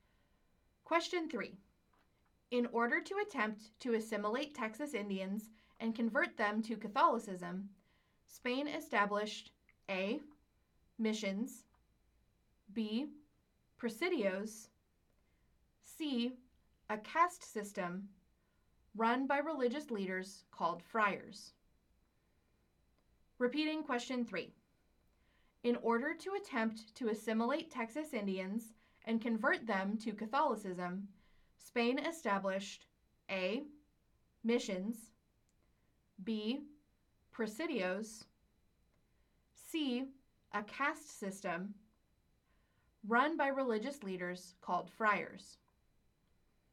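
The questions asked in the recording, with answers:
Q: In order to attempt to assimilate Texas Indians and convert them to Catholicism, Spain established A. missions, B. presidios, C. a caste system run by religious leaders called friars.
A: A: missions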